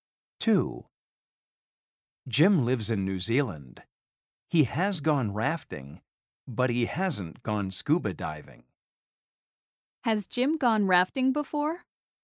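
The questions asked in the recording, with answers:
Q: Has Jim gone rafting before?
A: Yes, he has.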